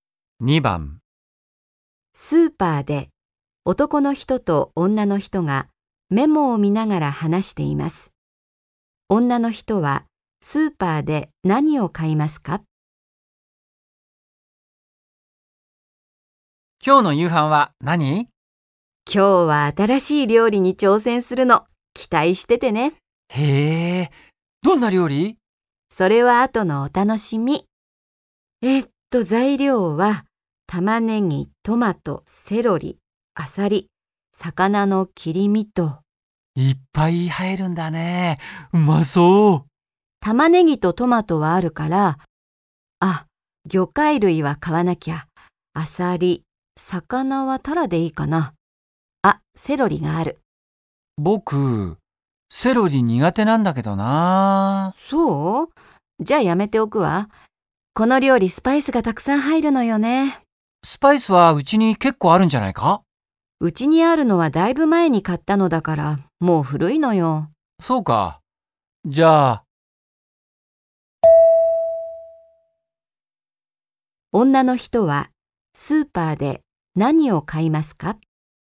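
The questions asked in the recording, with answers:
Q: 女の人はスーパーで何を買いますか?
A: アサリと魚(タラ)とスパイス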